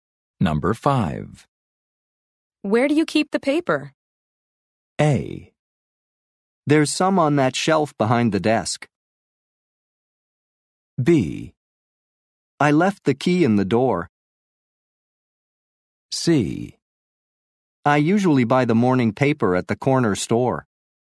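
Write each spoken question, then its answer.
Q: Where do you keep the paper?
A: A: There's some on that shelf behind the desk.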